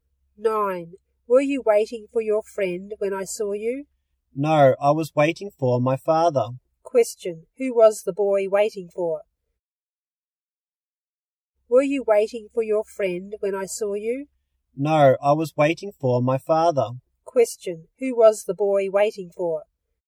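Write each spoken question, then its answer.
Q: Question, who was the boy waiting for?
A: His father.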